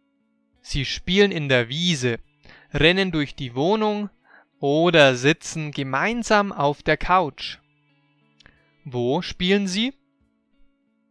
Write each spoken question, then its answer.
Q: Wo spielen Sie?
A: In der Wiese. Sie spielen in der Wiese